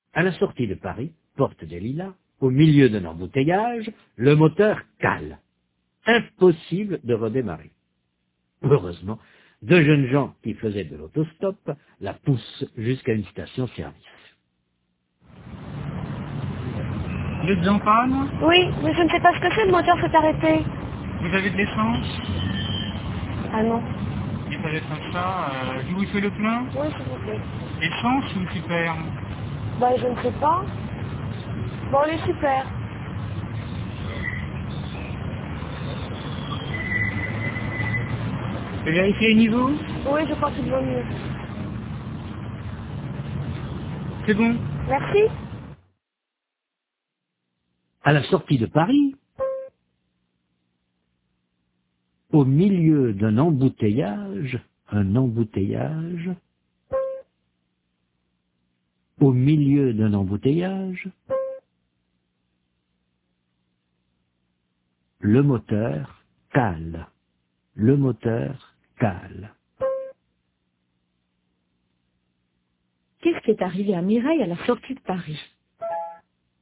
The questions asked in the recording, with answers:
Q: Qu'est-ce qui est arrivé à Mireille à la sortie de Paris ?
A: Le moteur a calé.